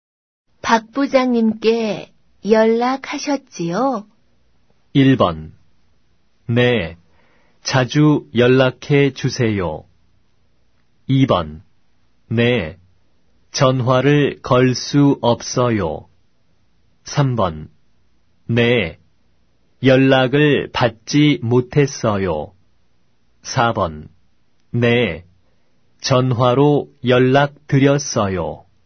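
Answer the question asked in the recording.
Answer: 4: 네, 전화로 연락 드렸어요.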